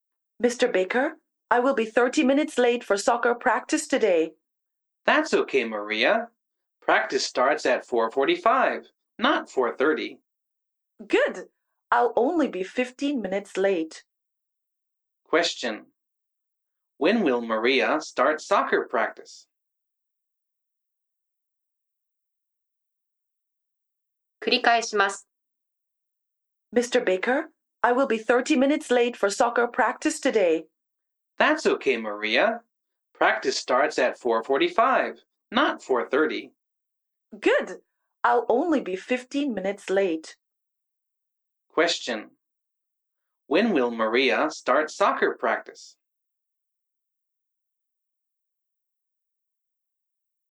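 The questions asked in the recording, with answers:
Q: When will Maria start soccer practice?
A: At 5:00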